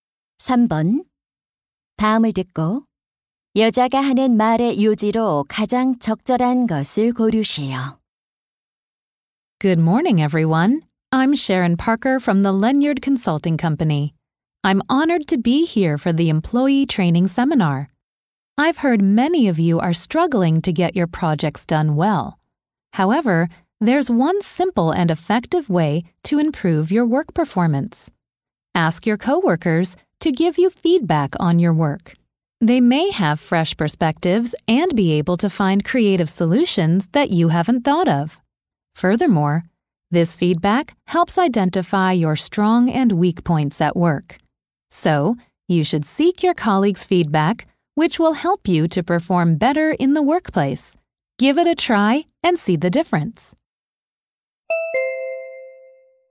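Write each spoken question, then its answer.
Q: 다음을 듣고 여자가 하는 말의 요지로 가장 적절한 것을 고르시오.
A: 동료의 피드백을 구하면 업무 성과를 높일 수 있다.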